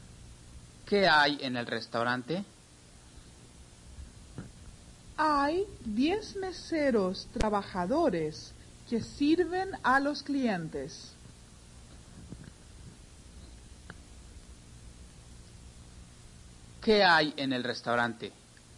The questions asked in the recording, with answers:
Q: ¿Qué hay en el restaurante?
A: Hay 10 meseros trabajadores que sirven a los clientes.